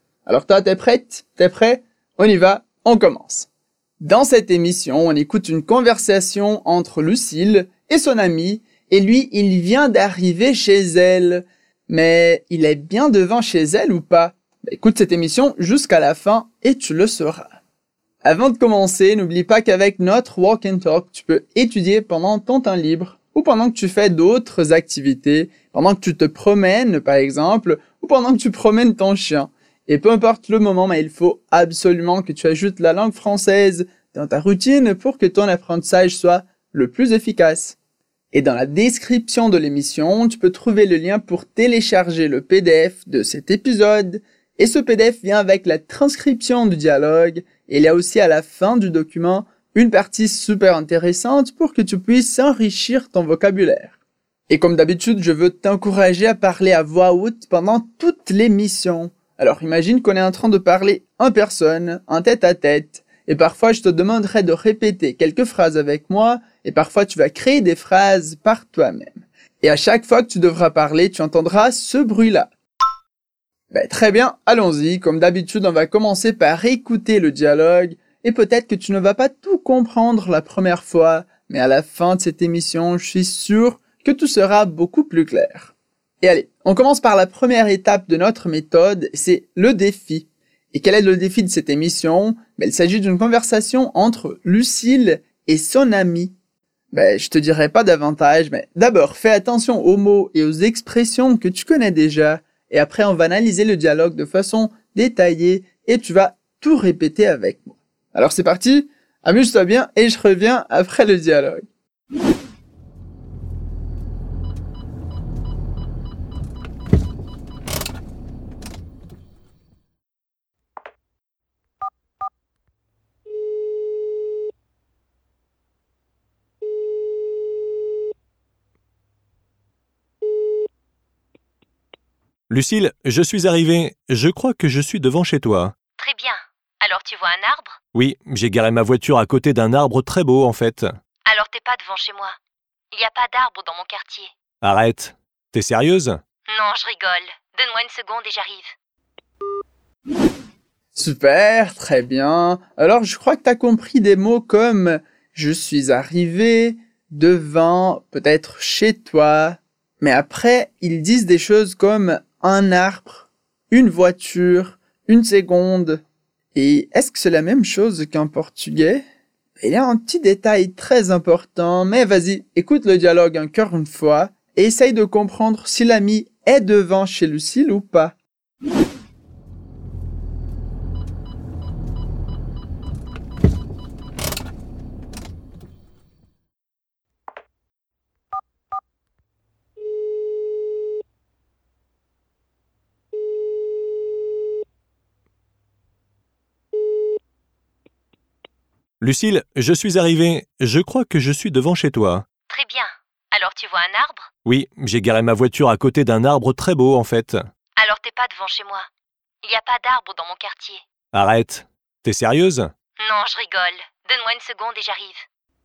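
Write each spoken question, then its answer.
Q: Mais il est bien devant chez elle ou pas?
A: Oui, il est devant chez elle (Lucille plaisantait au sujet des arbres)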